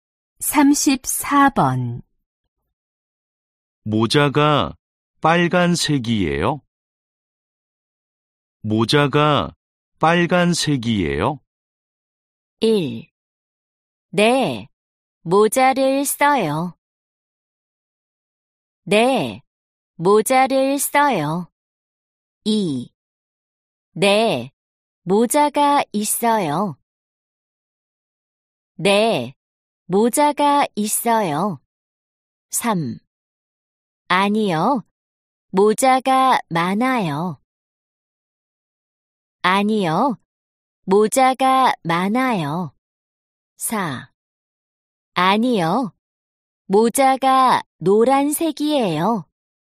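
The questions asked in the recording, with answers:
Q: 모자가 빨간색이에요?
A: 4: 아니요, 모자가 노란색이에요.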